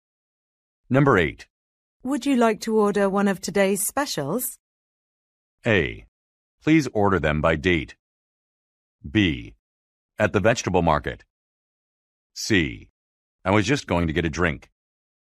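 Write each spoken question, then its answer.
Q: Would you like to order one of today's specials?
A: C: I was just going to get a drink.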